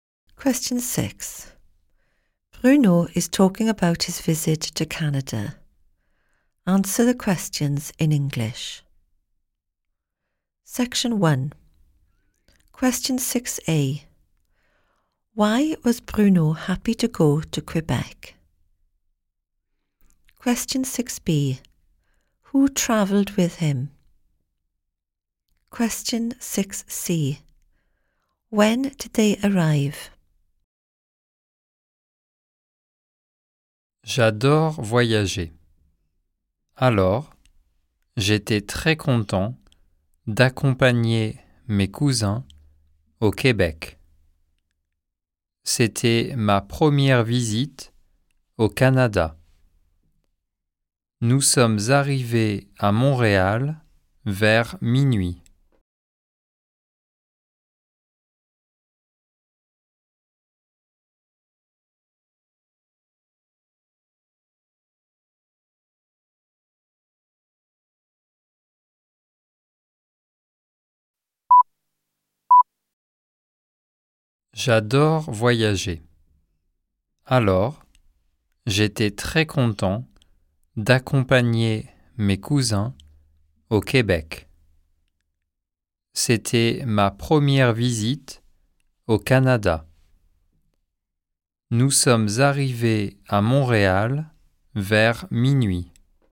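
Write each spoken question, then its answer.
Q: Why was Bruno happy to go to Quebec?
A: He loves travelling

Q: Who travelled with him?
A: His cousins

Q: When did they arrive?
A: Around midnight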